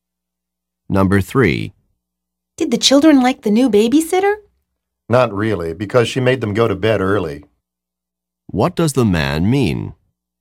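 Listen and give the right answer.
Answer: The babysitter made the children go to bed early, so they didn't like her.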